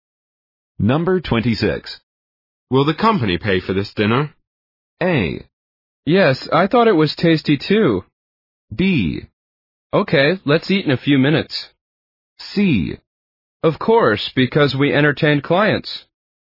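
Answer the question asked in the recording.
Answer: C: Of course, because we entertained clients.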